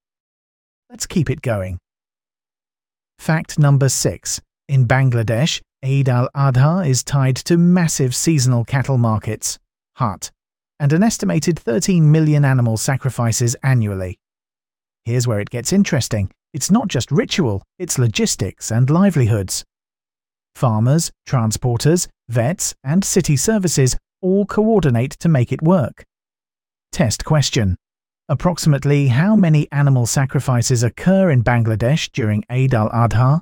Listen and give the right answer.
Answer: 13 million.